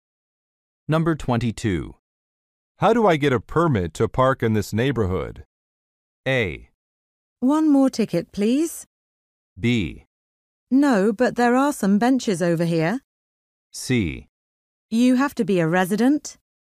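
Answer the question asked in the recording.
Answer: C: You have to be a resident.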